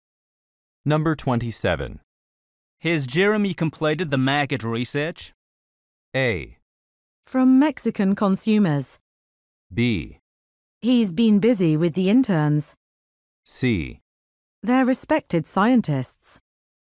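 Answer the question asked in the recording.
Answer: B: He's been busy with the interns.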